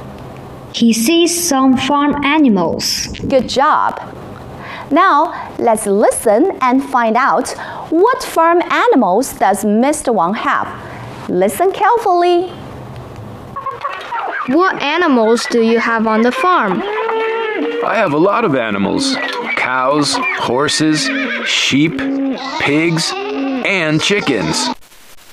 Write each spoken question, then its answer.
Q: What farm animals does Mr. Wang have?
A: He has cows, horses, chickens, pigs, and sheep.